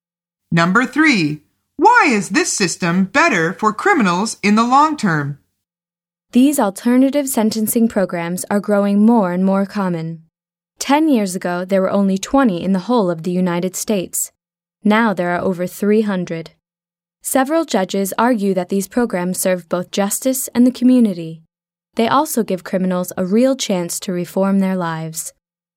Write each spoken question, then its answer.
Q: Why is this system better for criminals in the long term?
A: The answer is it gives them a chance to reform their lives.